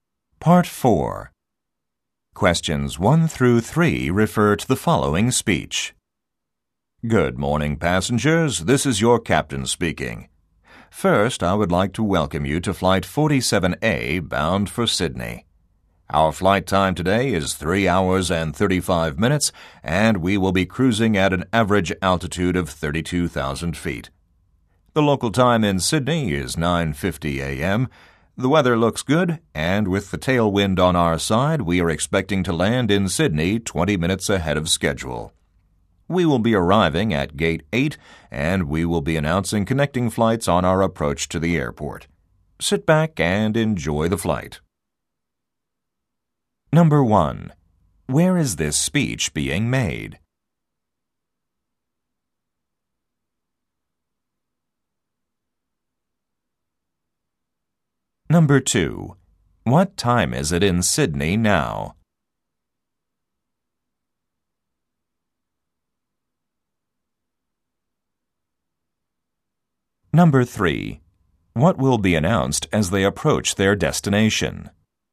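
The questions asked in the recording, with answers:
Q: Where is this speech being made?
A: On an airplane

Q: What time is it in Sydney now?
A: 9:50 a.m.

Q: What will be announced as they approach their destination?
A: Connecting flights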